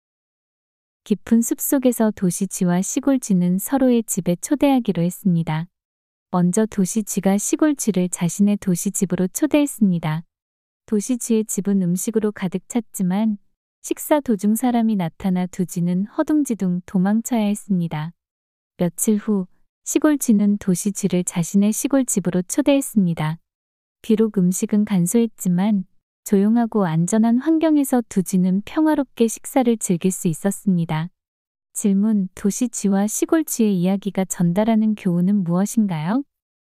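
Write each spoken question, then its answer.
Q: 도시쥐와 시골쥐의 이야기가 전달하는 교훈은 무엇인가요?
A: 풍족하지만 위험한 삶보다 소박해도 안전하고 평화로운 삶이 더 낫다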